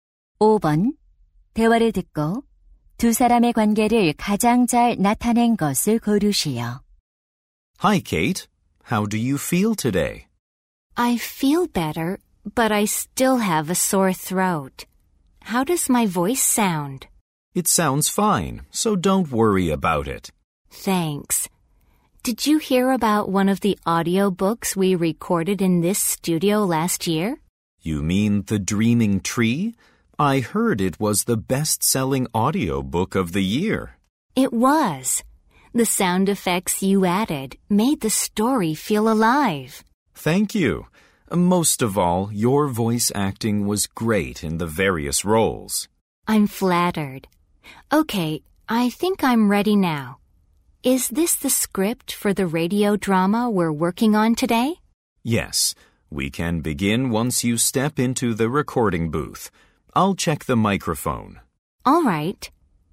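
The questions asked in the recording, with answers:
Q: 대화를 듣고 두 사람의 관계를 가장 잘 나타낸 것을 고르시오.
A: 음향 기술자 - 성우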